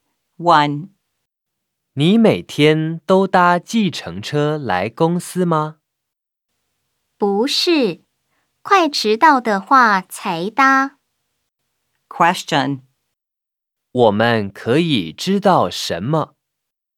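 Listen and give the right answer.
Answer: 他只有快迟到的时候才搭计程车来公司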